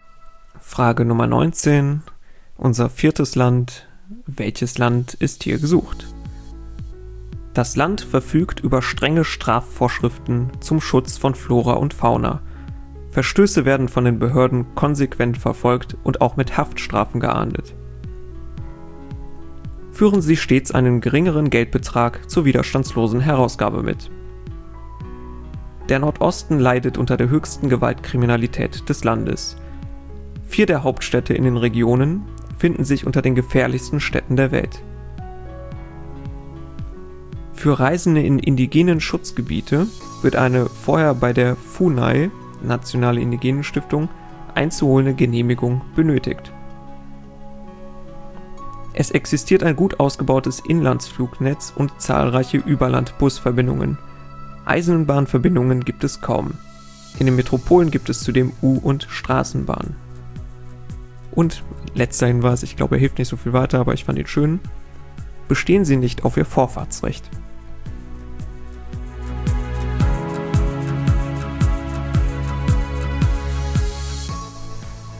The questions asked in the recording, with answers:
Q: Welches Land ist hier gesucht?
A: ist Brasilien.